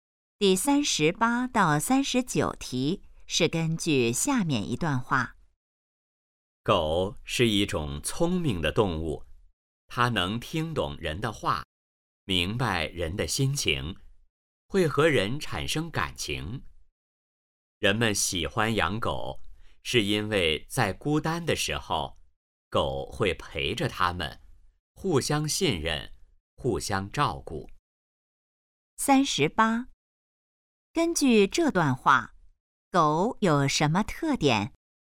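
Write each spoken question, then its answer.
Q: 根据这段话,狗有什么特点?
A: 聪明,能听懂人的话

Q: 人们为什么喜欢狗?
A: 孤单时狗会陪着他们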